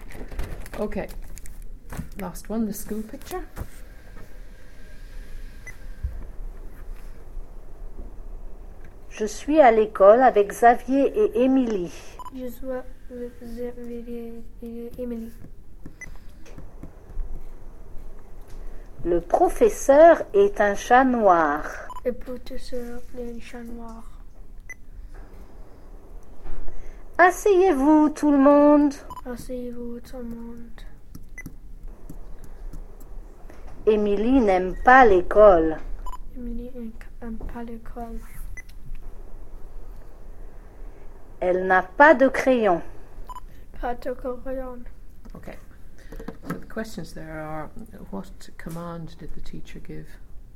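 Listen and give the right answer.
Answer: Sit down, everyone (Asseyez-vous, tout le monde)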